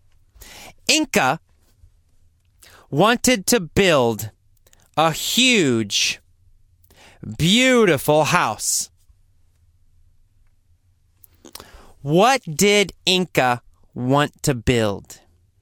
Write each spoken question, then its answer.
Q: What did Inca want to build?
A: Well, Inca wanted to build a huge, beautiful house.